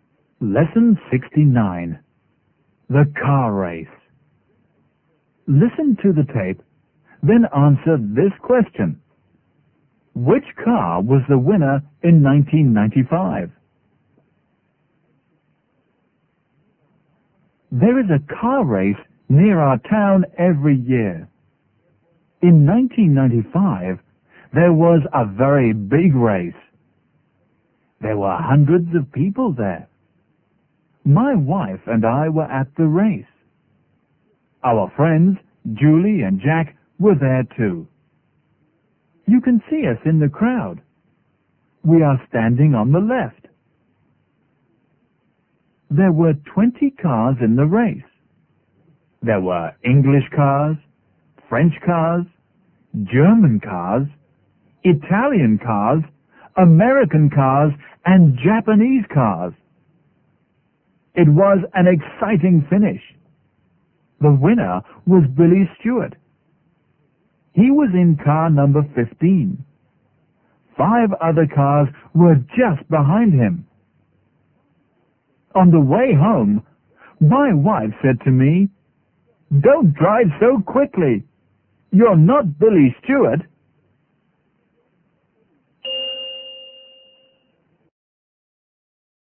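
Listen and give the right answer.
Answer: Car number 15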